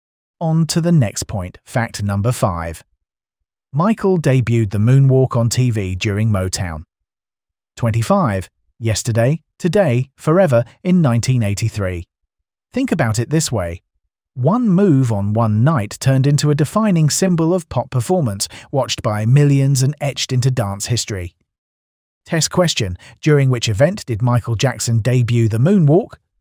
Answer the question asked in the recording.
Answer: Correct answer. Motown 25.